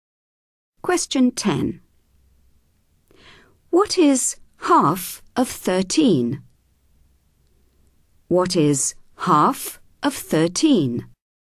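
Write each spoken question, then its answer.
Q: What is half of 13?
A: 6.5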